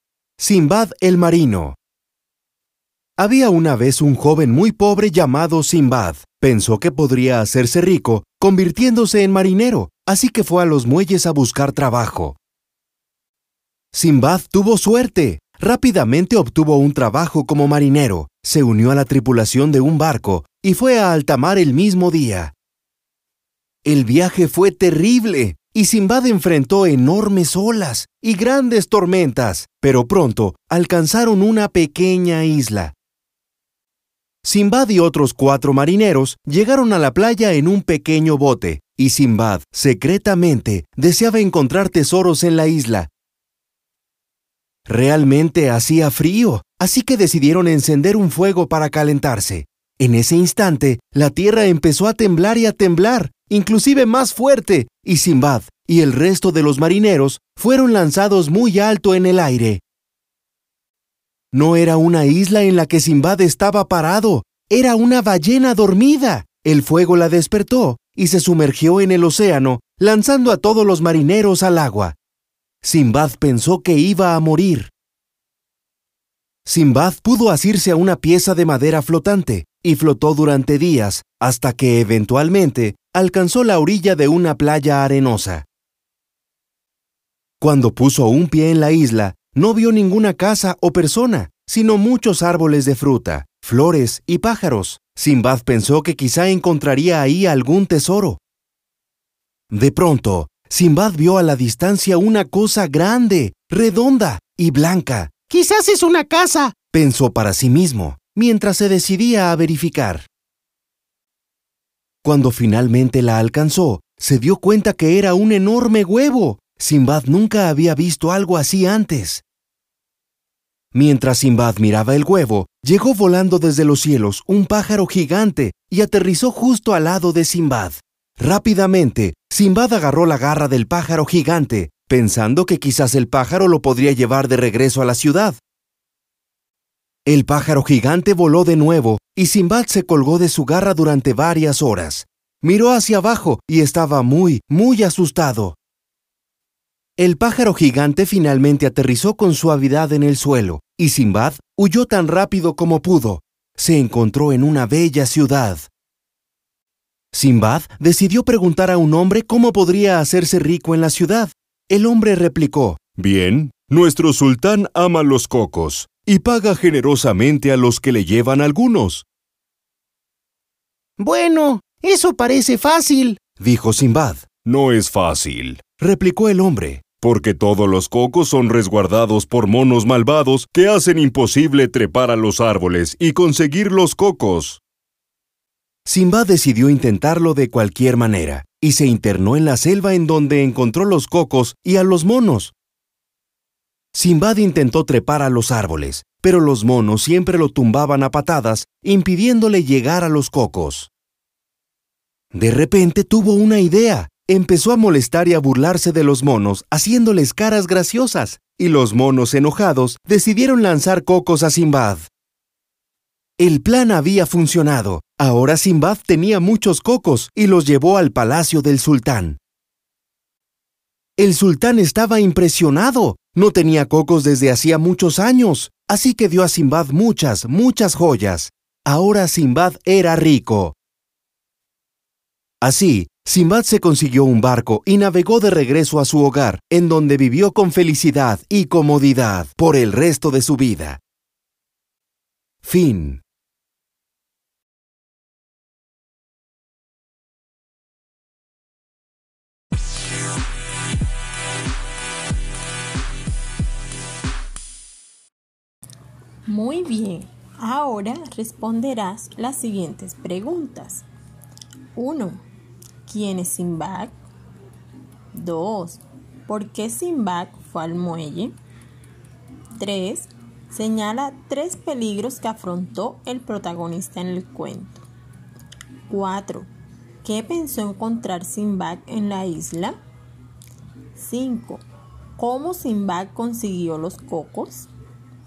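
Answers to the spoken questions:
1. Un joven muy pobre que se hizo marinero
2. Para buscar trabajo como marinero y hacerse rico
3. Tormentas y olas enormes, la ballena que lo lanzó al mar, colgarse del pájaro gigante (y los monos malvados)
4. Tesoros
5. Se burló de los monos y estos, enojados, le lanzaron los cocos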